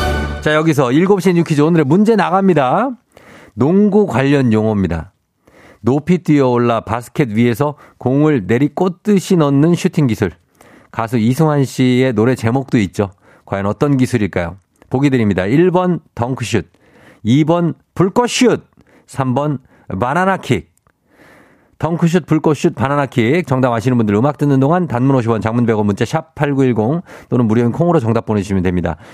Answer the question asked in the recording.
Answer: 정답 1번 덩크슛입니다.